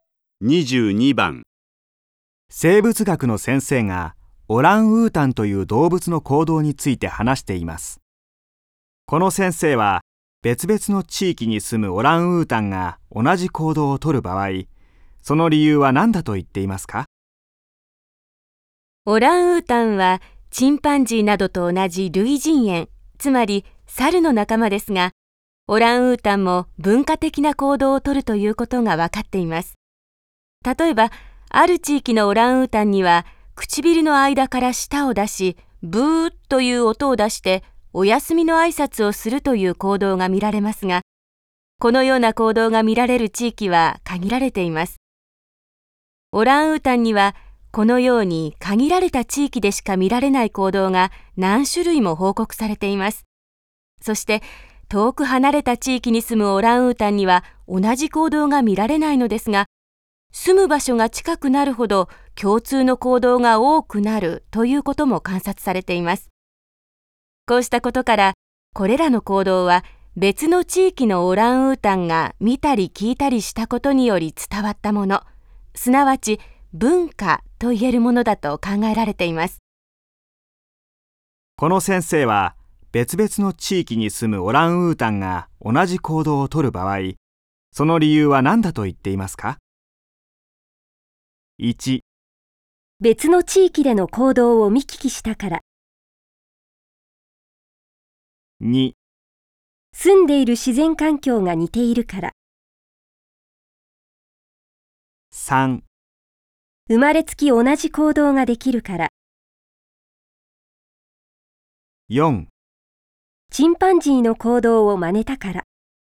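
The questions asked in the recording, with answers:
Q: この先生は別々の地域に住むオランウータンが同じ行動をとる場合、その理由は何だと言っていますか?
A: 1: 別の地域での行動を見聞きしたから。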